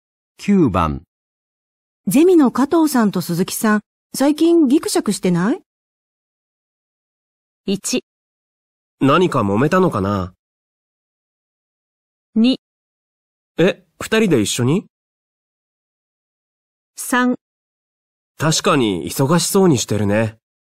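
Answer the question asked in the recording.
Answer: 1: 何か揉めたのかな?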